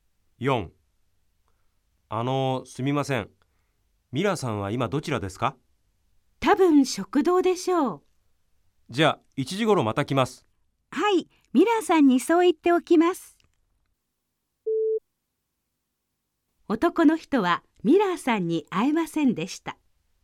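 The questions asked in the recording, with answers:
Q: 男の人はミラーさんに会えませんでした。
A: ○(正しい)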